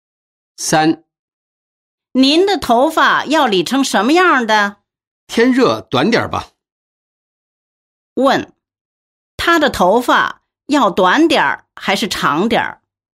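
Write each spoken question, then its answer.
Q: 他的头发要短点还是长点?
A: 短点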